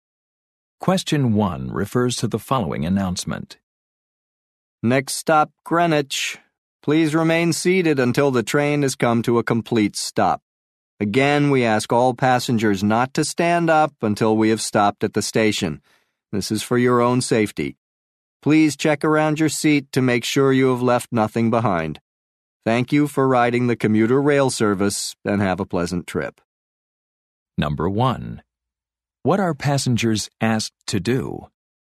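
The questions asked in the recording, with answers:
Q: What are passengers asked to do?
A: Remain seated until the train stops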